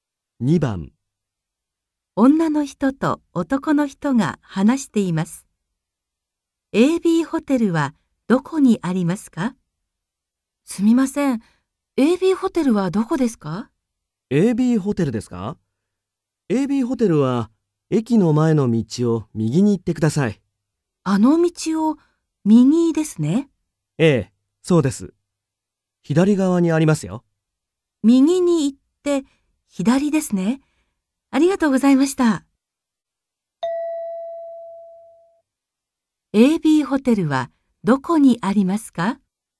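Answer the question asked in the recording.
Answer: 駅の前の道を右に行って、左側にあります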